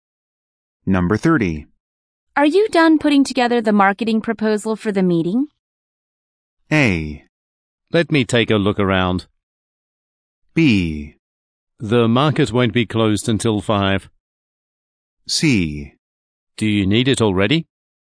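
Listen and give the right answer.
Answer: C: Do you need it already?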